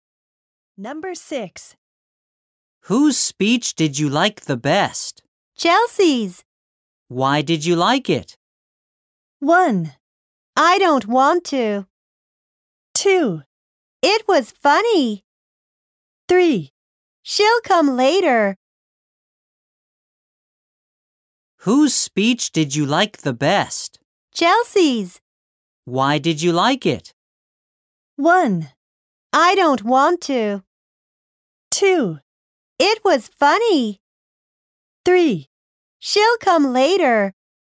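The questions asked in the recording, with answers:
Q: Why did you like it?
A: 2: It was funny.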